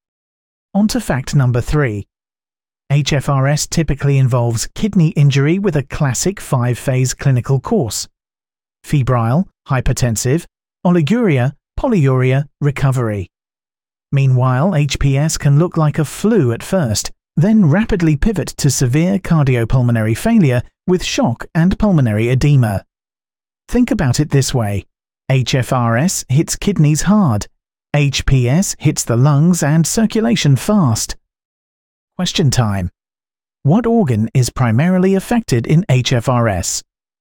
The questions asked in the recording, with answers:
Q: Question time. What organ is primarily affected in HFRS?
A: Correct answer, kidneys.